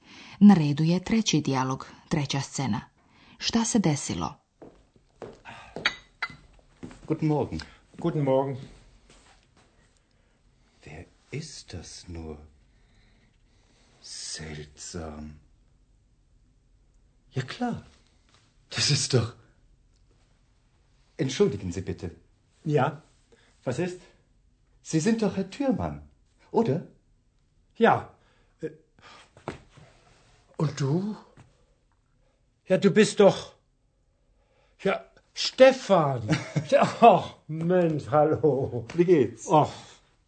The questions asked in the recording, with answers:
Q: Šta se desilo?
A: Doktor Türman je očito, nakon dužeg vremena, iznenada sreo jednog prijatelja.